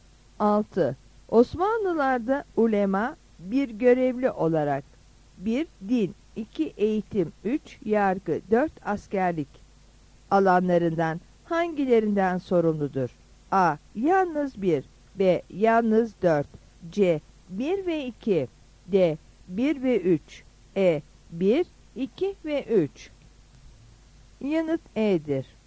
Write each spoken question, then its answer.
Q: Askerlik alanlarından hangilerinden sorumludur?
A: Yanıt E'dir.